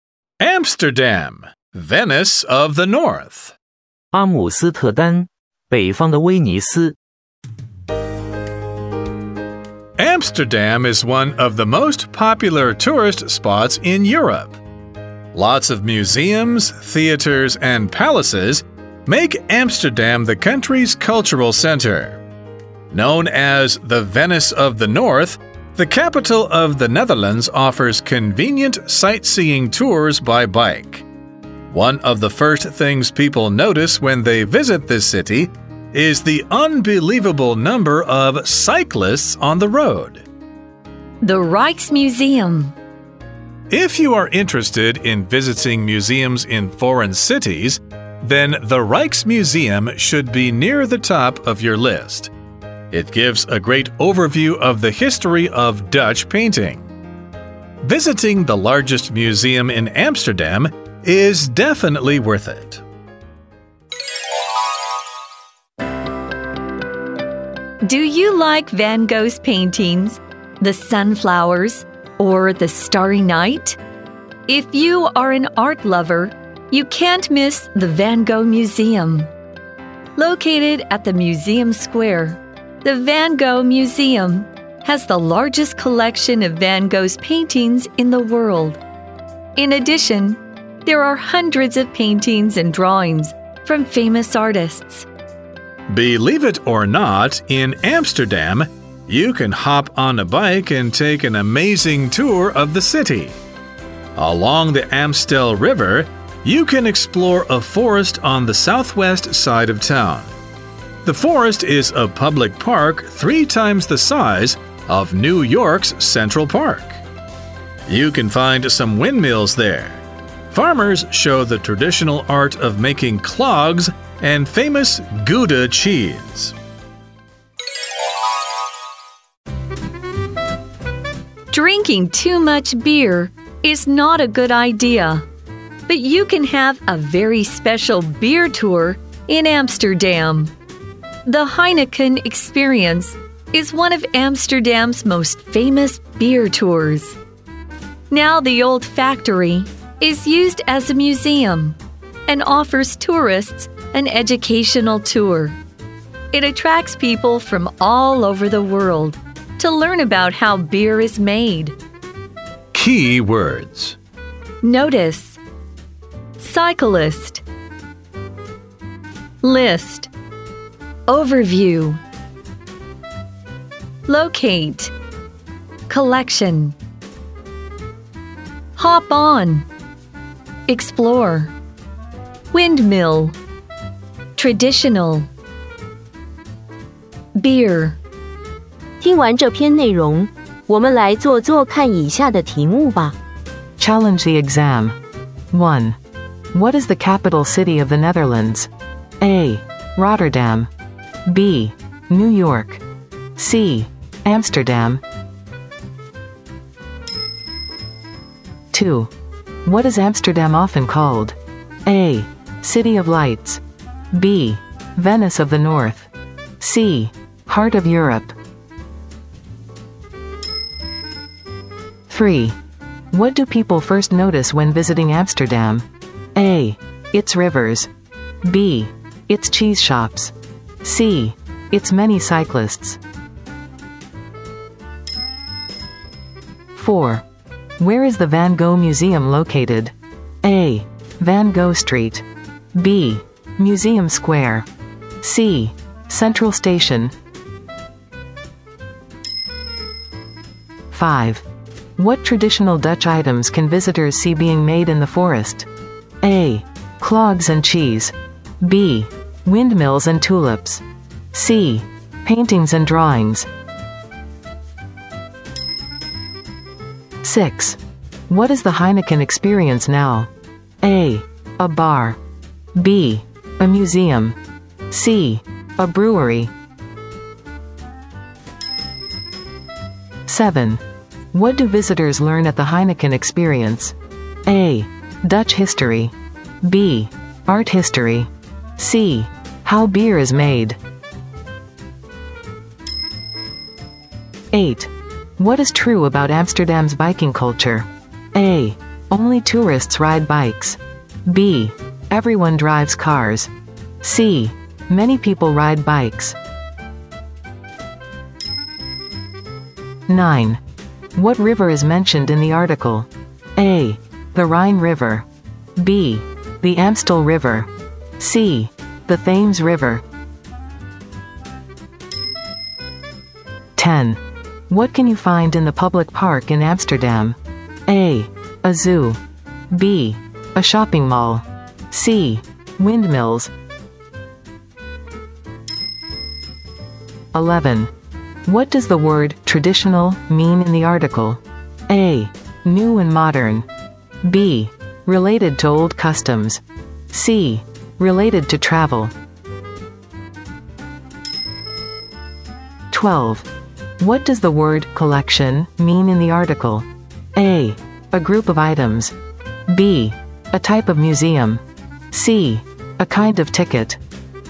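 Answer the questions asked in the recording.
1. C: Amsterdam.
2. B: Venice of the North.
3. C: Its many cyclists.
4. B: Museum Square.
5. A: Clogs and cheese.
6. B: A museum.
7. C: How beer is made.
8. C: Many people ride bikes.
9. B: The Amstel River.
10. C: Windmills.
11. B: Related to old customs.
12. A: A group of items.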